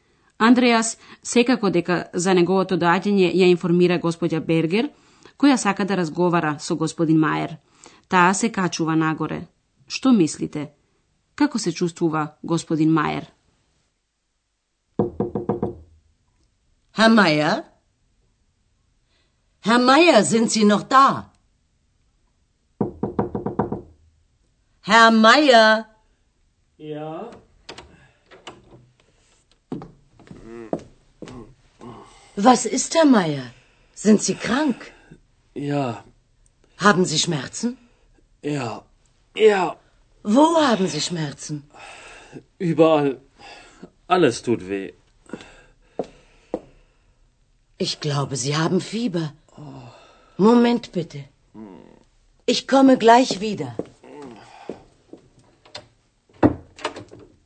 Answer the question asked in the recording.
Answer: Тој е болен.